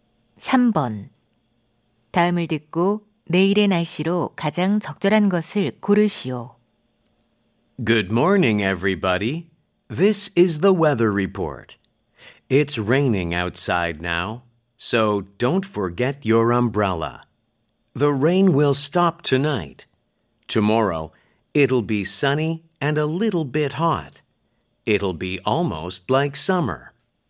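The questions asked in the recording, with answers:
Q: 다음을 듣고 내일의 날씨로 가장 적절한 것을 고르시오.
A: 맑고 조금 더움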